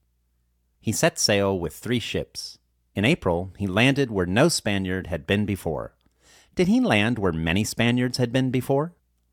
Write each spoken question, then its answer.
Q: Did he land where many Spaniards had been before?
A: No, he did not land where many Spaniards had been before.